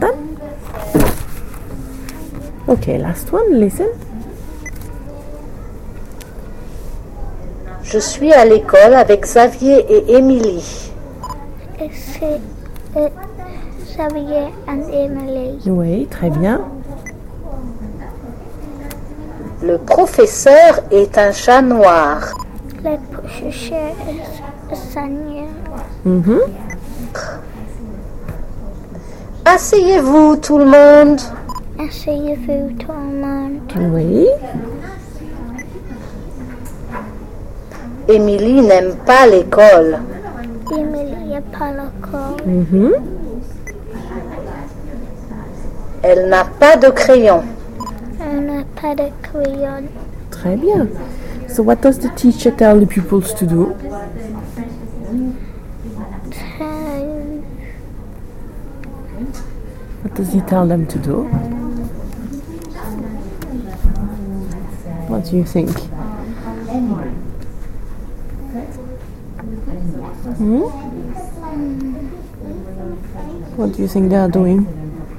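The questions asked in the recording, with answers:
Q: So what does the teacher tell the pupils to do?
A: Sit down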